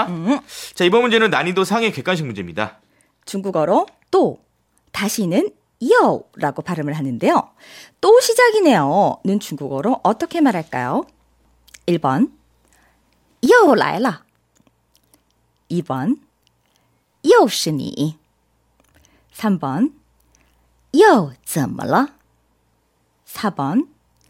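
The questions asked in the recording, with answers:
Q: 또 시작이네요는 중국어로 어떻게 말할까요?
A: 1: 요라이라 (又来了)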